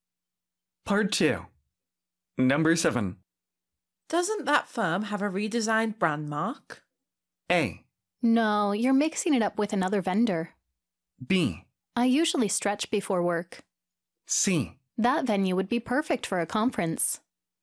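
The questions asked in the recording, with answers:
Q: Doesn't that firm have a redesigned brand mark?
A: A: No, you're mixing it up with another vendor.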